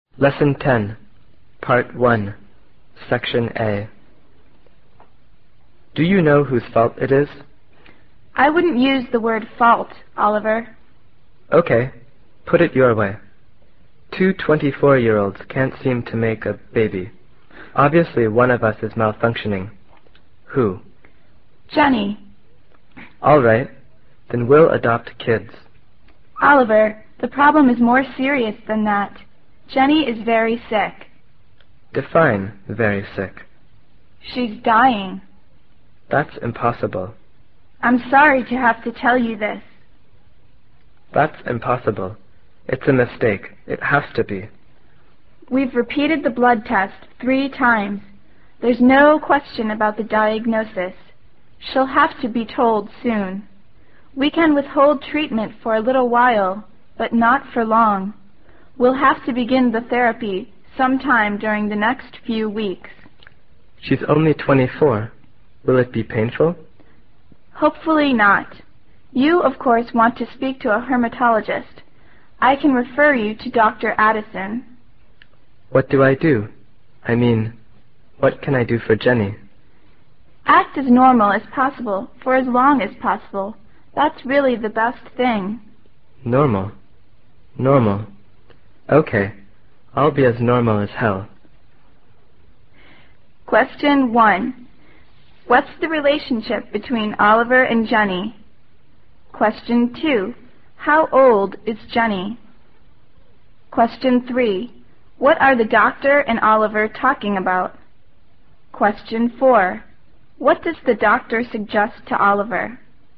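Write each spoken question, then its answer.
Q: What's the relationship between Oliver and Jenny?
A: They are husband and wife

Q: How old is Jenny?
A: 24

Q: What are the doctor and Oliver talking about?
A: Jenny's serious illness; she is dying

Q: What does the doctor suggest to Oliver?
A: To act as normal as possible for as long as possible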